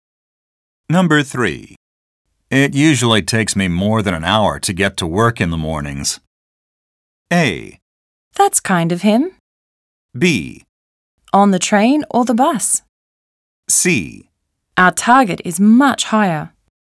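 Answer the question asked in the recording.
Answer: B: On the train or the bus?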